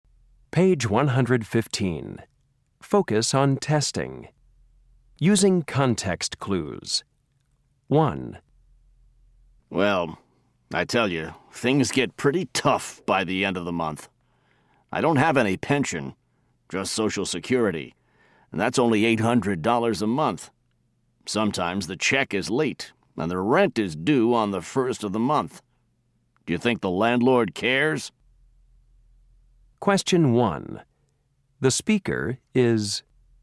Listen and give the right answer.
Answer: Sometimes I think no one cares about retired people in this country.